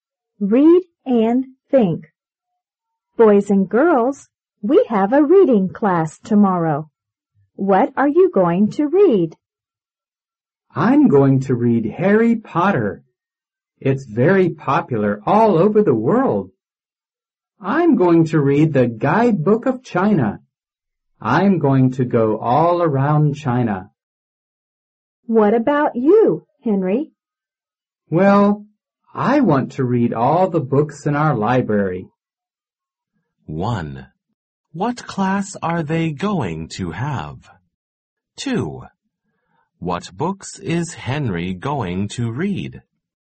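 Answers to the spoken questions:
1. A reading class
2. All the books in their library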